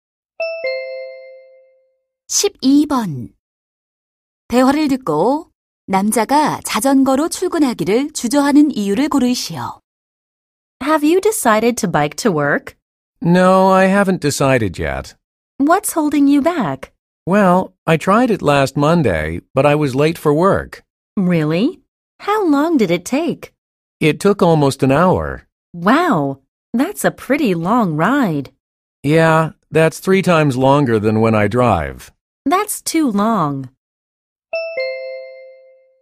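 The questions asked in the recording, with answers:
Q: 대화를 듣고 남자가 자전거로 출근하기를 주저하는 이유를 고르시오.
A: 시간이 너무 오래 걸려서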